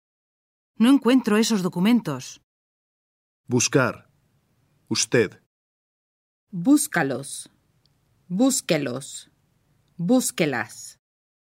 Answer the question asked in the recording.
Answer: Búsquelos.